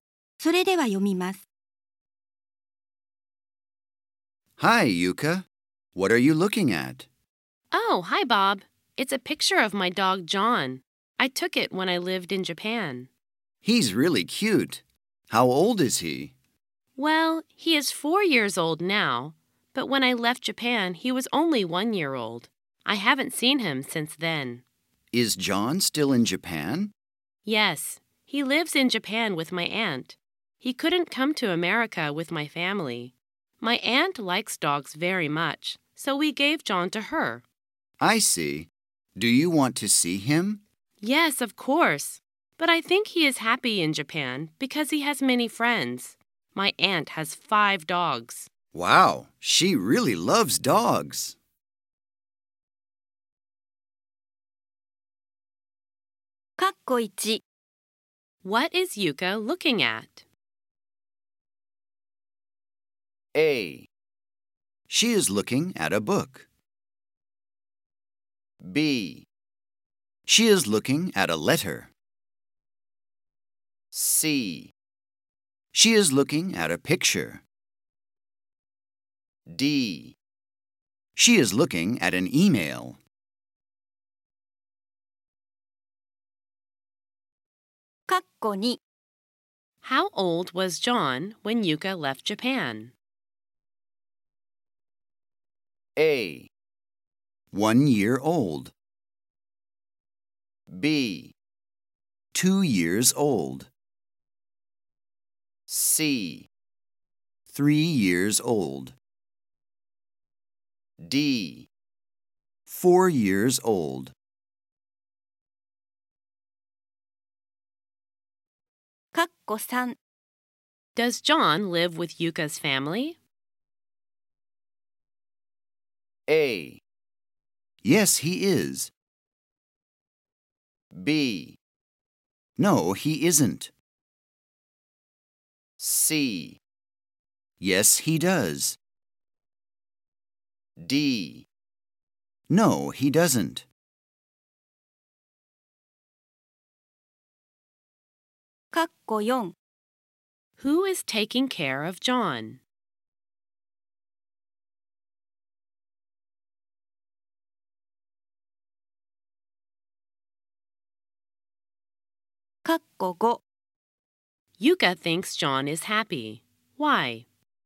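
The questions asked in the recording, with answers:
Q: What is Yuka looking at?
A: C: She is looking at a picture.

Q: How old was John when Yuka left Japan?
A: A: 1 year old.

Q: Does John live with Yuka's family?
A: D: No, he doesn't.

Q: Who is taking care of John?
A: Yuka's aunt.

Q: Yuka thinks John is happy. Why?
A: Because he has many friends.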